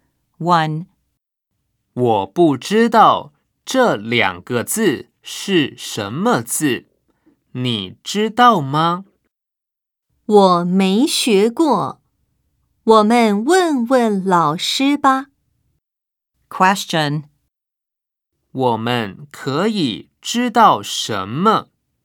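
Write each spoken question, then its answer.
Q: 我们可以知道什么?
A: 他们都不认识这两个字,要问老师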